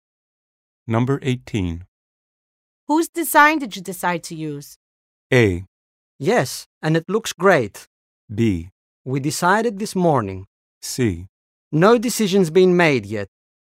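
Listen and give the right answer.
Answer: C: No decision's been made yet.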